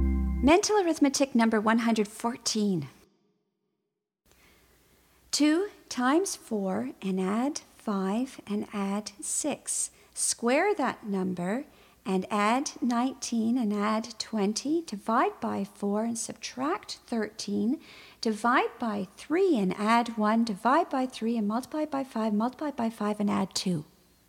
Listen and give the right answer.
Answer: And the answer is 252.